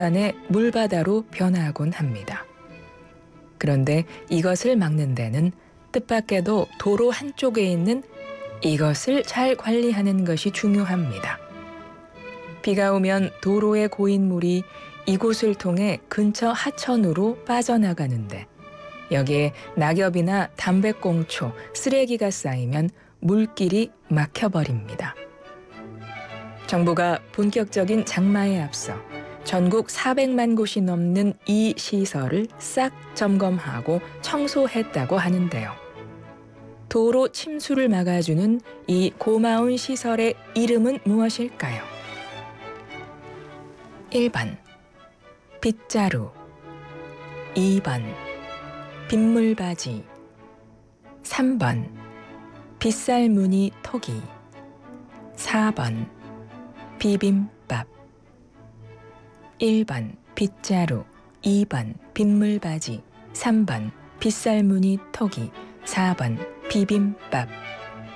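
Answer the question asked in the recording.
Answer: 2번: 빗물받이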